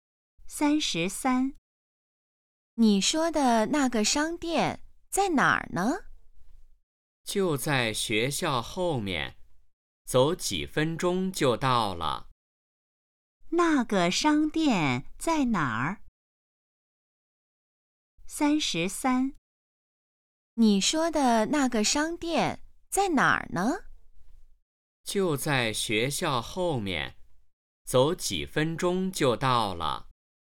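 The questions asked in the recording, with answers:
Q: 那个商店在哪儿?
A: 在学校后面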